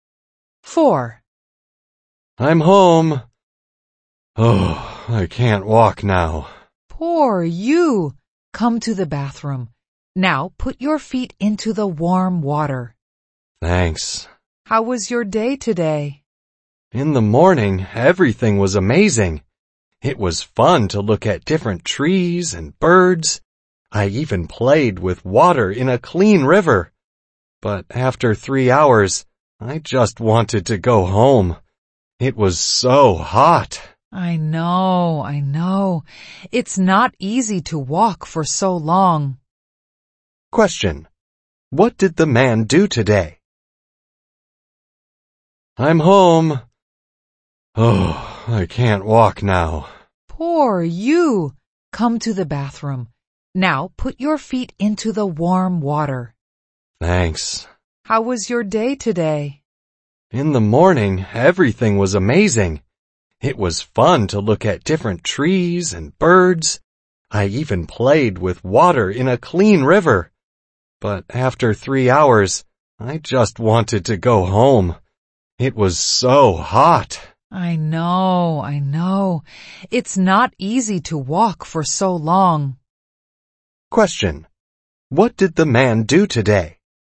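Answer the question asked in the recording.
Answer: He went hiking (walked for a long time)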